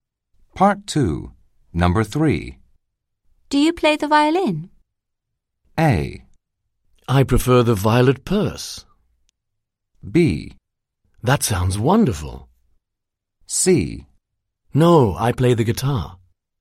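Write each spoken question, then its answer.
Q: Do you play the violin?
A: C: No, I play the guitar.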